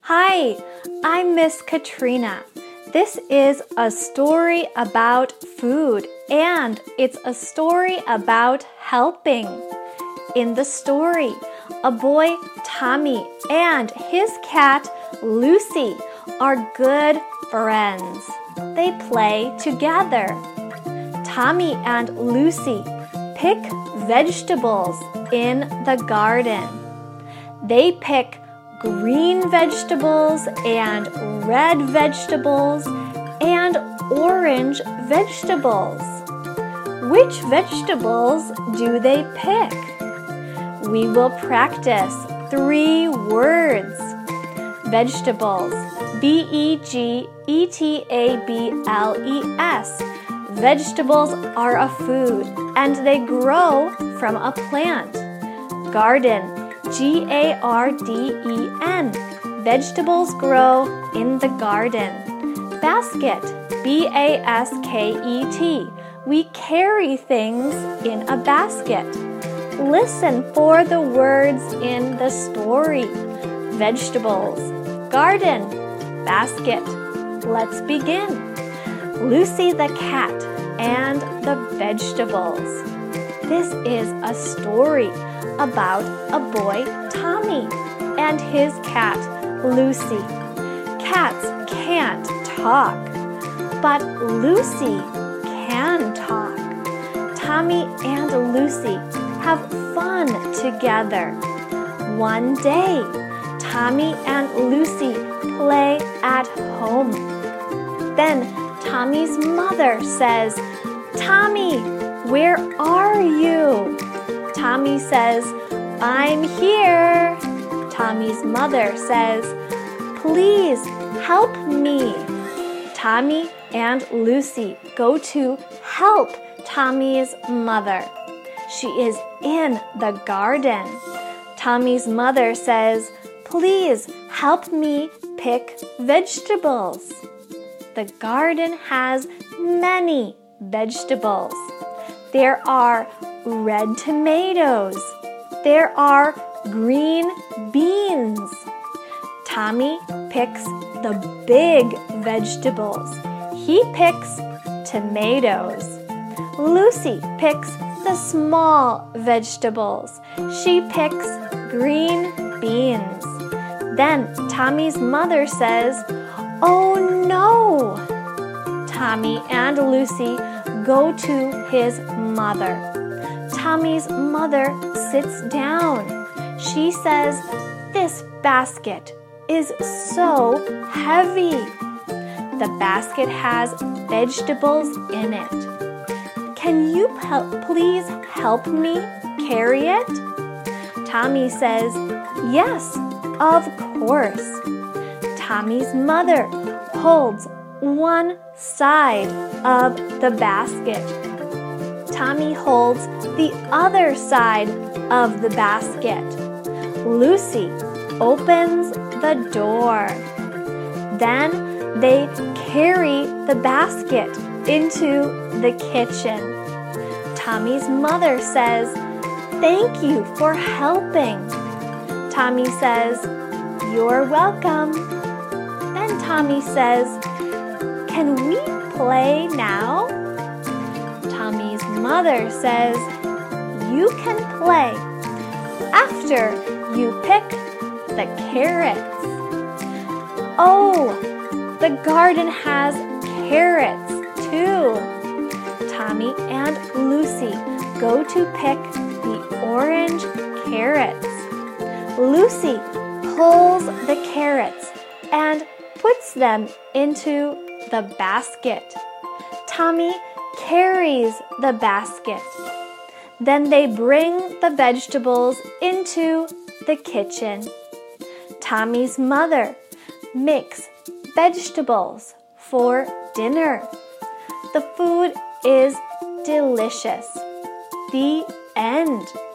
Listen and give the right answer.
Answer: They pick tomatoes, and green beans, and carrots.